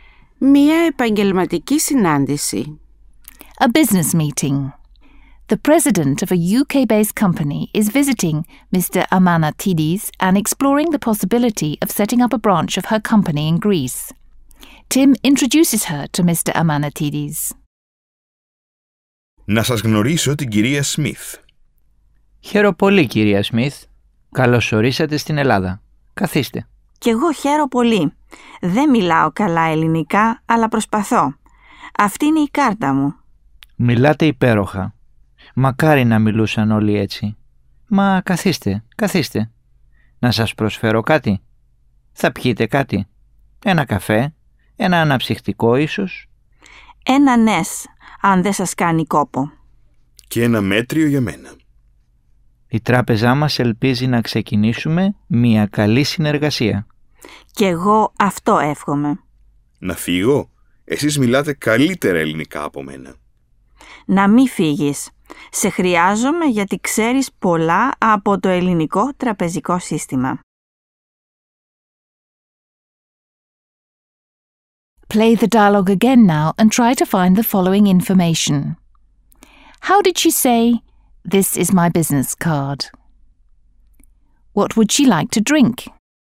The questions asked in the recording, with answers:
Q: How did she say, "This is my business card"?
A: Αυτή είναι η κάρτα μου,

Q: What would she like to drink?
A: She would like a Nescafe.